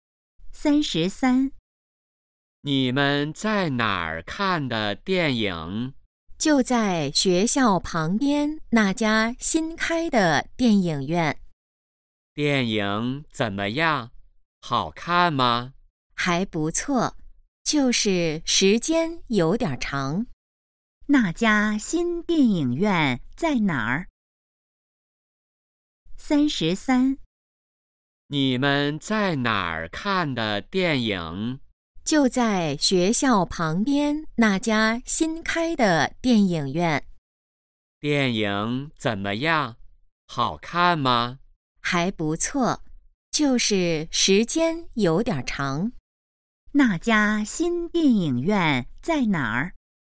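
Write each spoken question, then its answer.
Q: 那家新电影院在哪儿?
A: 学校旁边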